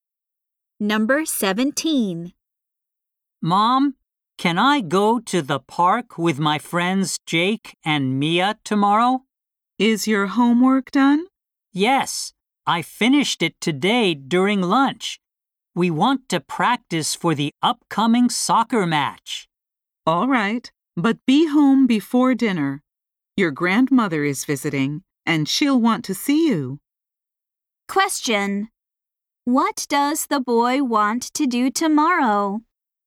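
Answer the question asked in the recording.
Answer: Go to the park to practice soccer with his friends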